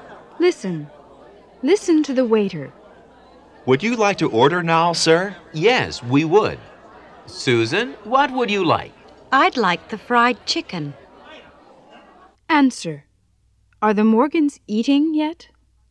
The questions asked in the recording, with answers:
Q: Are the Morgans eating yet?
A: No, they're not.